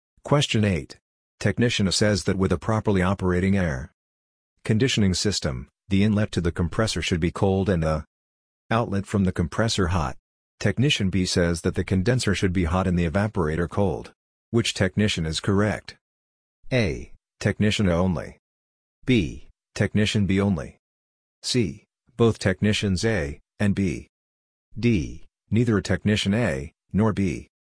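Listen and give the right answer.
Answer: C: Both technicians A and B.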